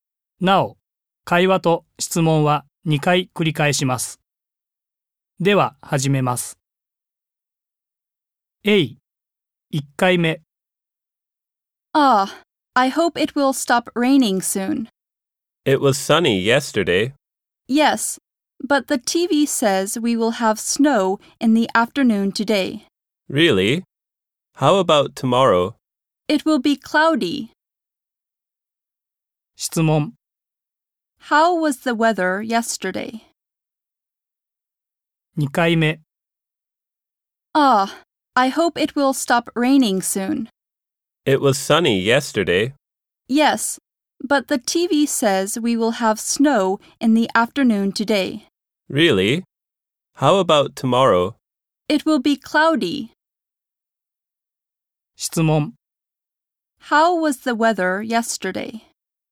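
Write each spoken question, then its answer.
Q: How was the weather yesterday?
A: It was sunny.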